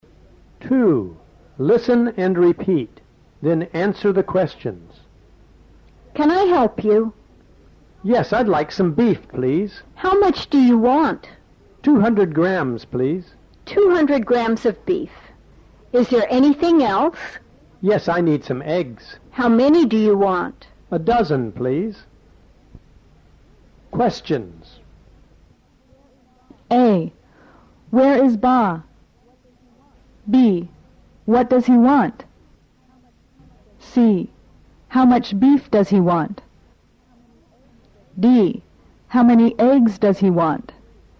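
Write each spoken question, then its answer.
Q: What does he want?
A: Some beef and some eggs

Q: How much beef does he want?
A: 200 grams

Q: How many eggs does he want?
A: A dozen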